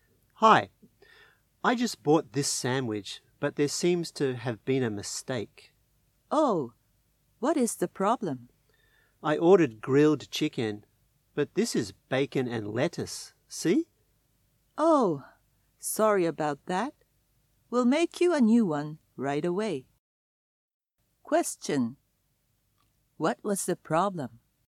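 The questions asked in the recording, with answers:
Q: What was the problem?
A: The customer got a bacon and lettuce sandwich instead of the grilled chicken one they ordered.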